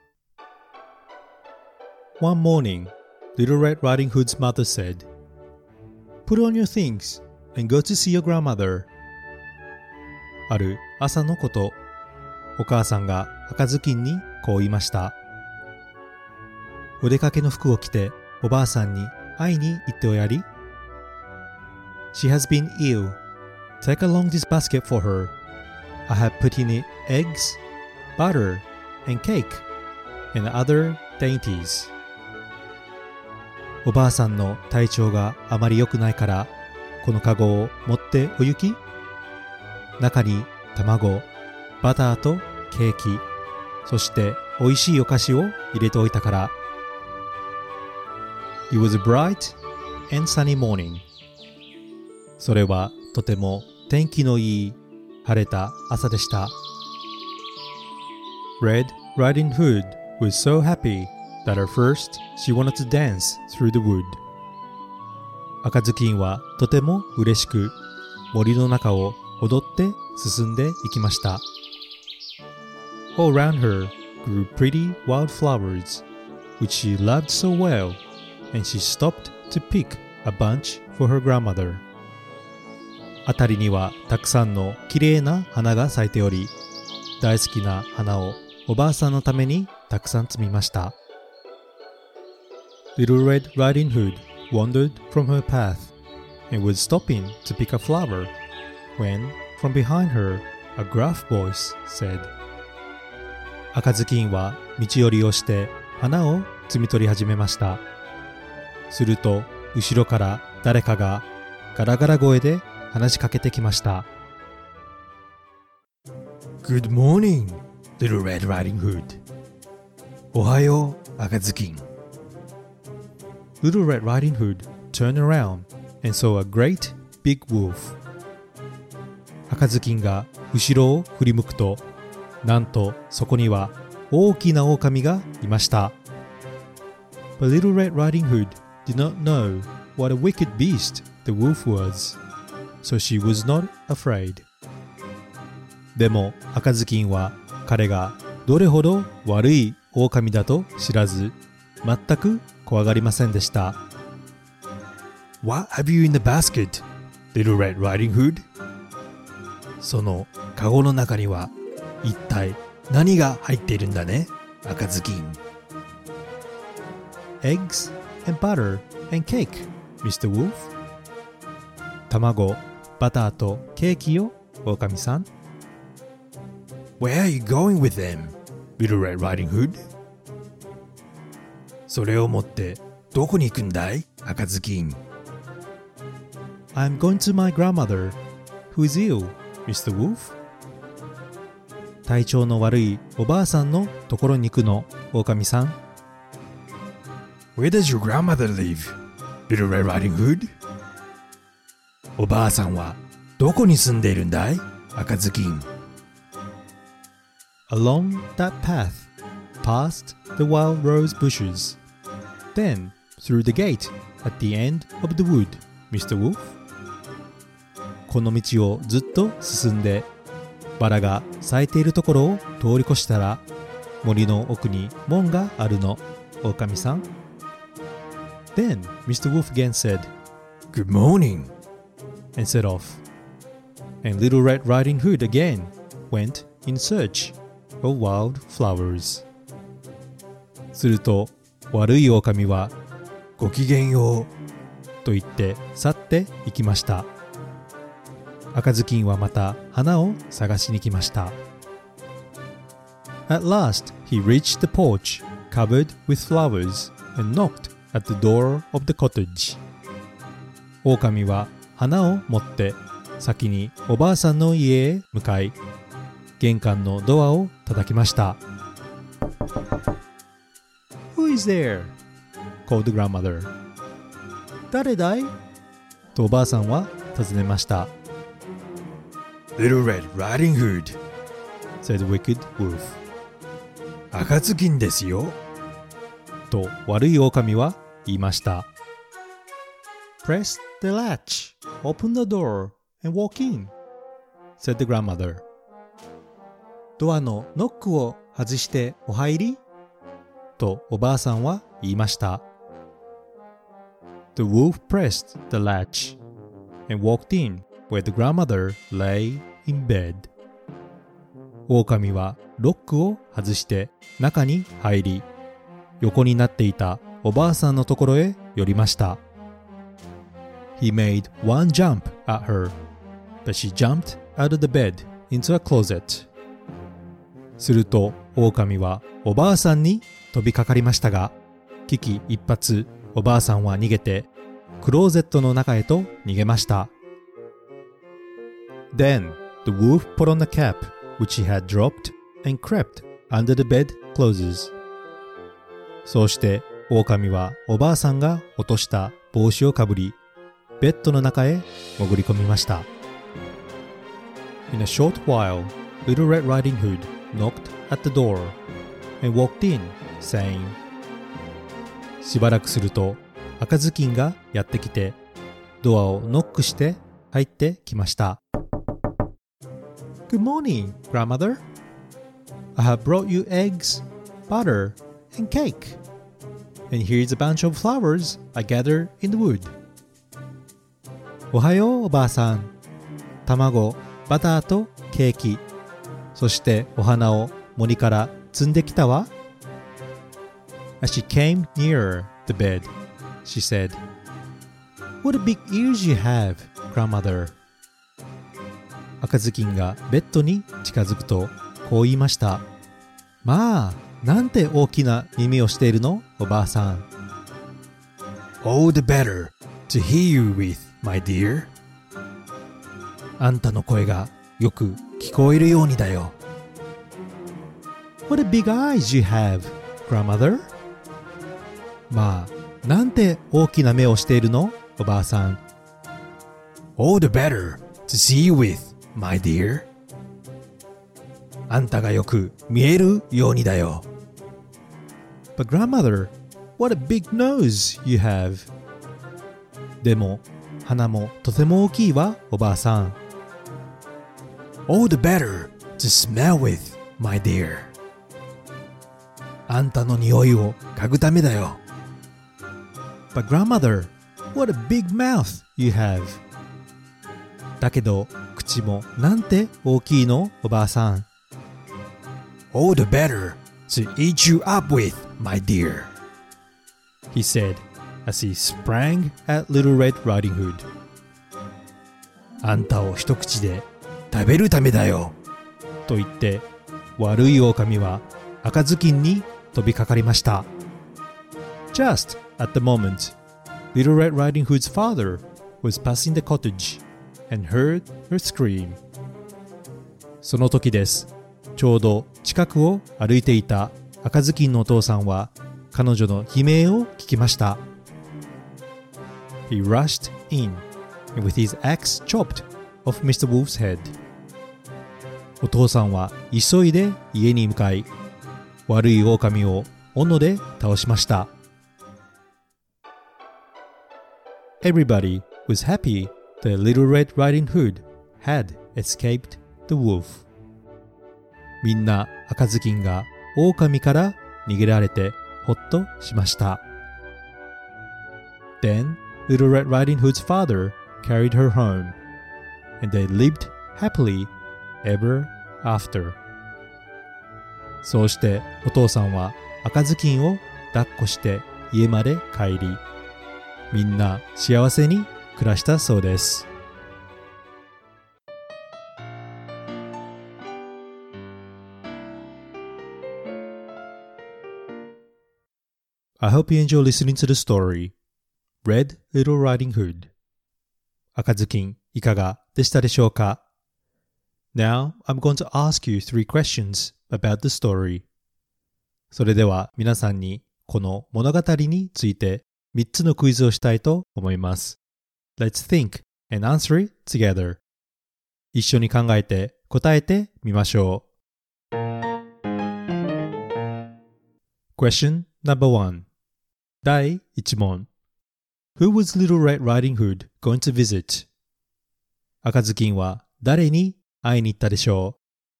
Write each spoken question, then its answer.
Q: Who was Little Red Riding Hood going to visit?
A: The answer is, she went to visit her grandmother.